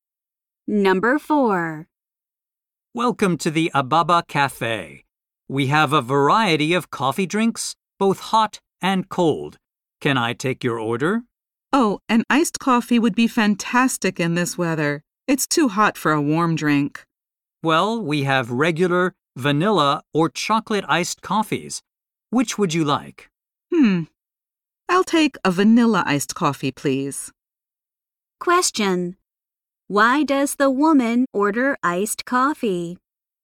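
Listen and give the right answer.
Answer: It's too hot for a warm drink.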